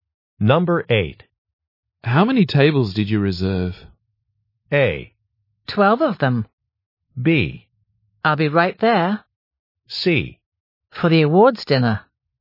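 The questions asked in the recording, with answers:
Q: How many tables did you reserve?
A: A: 12 of them.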